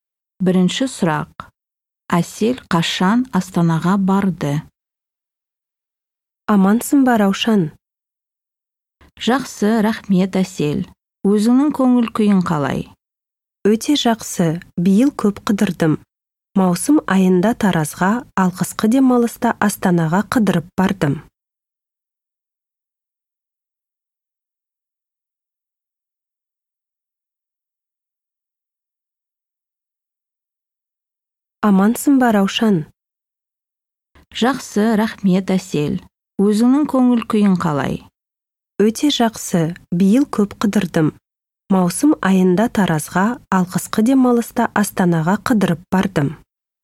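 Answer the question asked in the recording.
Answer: Қысқы демалыста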